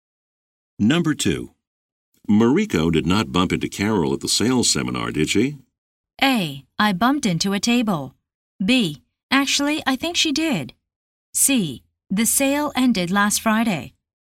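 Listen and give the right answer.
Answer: B: Actually, I think she did.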